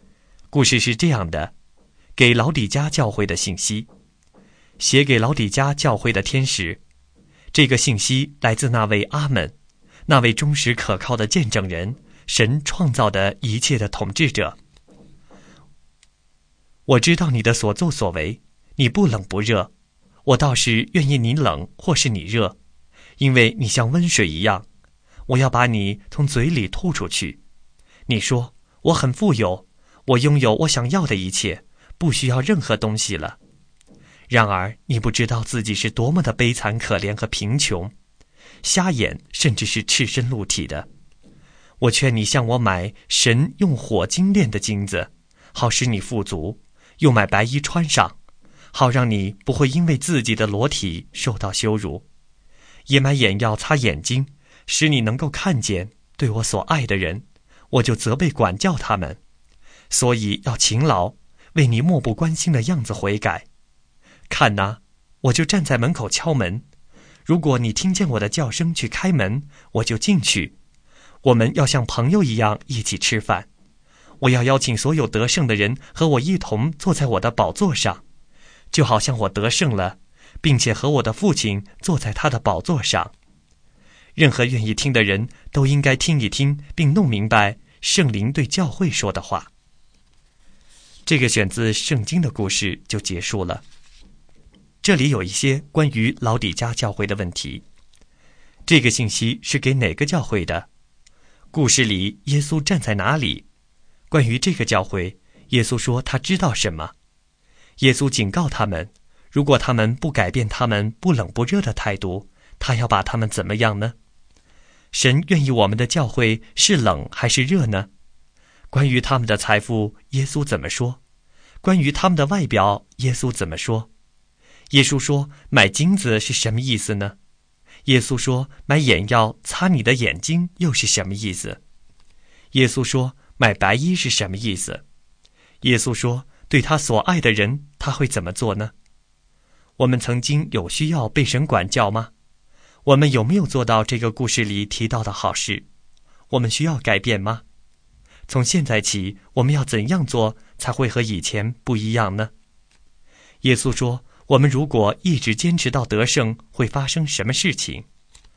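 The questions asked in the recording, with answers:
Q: 这个信息是给哪个教会的?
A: 老底家教会

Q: 故事里耶稣站在哪里?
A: 站在门口敲门

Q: 关于这个教会,耶稣说他知道什么?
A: 他们的所作所为,不冷不热

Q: 耶稣警告他们,如果他们不改变他们不冷不热的态度,他要把他们怎么样呢?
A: 把他们从嘴里吐出去

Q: 关于他们的财富,耶稣怎么说?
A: 他们自以为富有,其实悲惨可怜贫穷

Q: 关于他们的外表,耶稣怎么说?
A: 瞎眼,赤身露体

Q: 耶稣说对他所爱的人他会怎么做呢?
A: 责备管教他们

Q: 耶稣说,我们如果一直坚持到得胜,会发生什么事情?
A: 和他一同坐在他的宝座上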